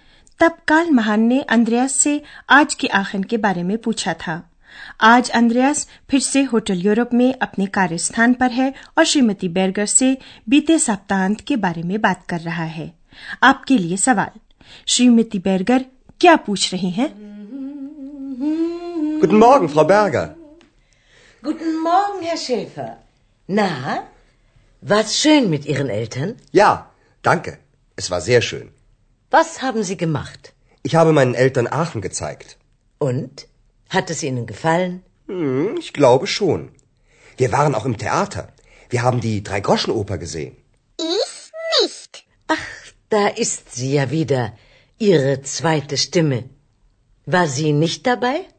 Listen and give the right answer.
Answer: श्रीमती बैरगर पूछती है कि अंद्रयास ने अपने माता पिता के साथ सप्तांत में क्या क्या किया और उन्हें आखिर कैसा लगा